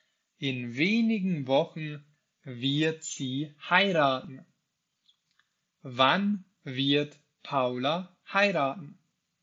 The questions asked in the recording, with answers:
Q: Wann wird Paula heiraten?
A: In wenigen Wochen. Paula wird in wenigen Wochen heiraten?